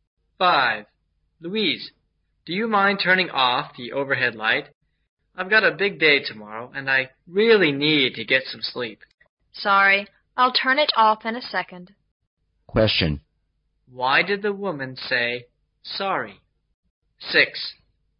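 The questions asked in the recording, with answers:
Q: Why did the woman say, sorry?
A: Because her overhead light was keeping the other person from sleeping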